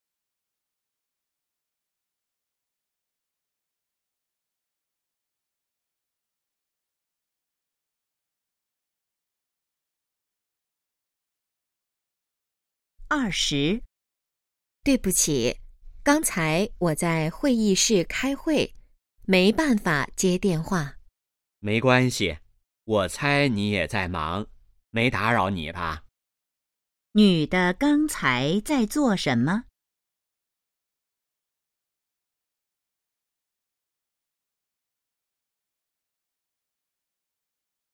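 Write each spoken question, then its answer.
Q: 女的刚才在做什么?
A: 开会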